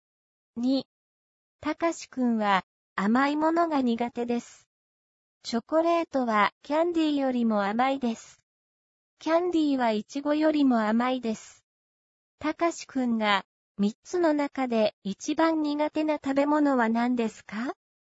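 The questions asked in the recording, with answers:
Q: たかしくんが3つの中で一番苦手な食べ物は何ですか?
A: チョコレート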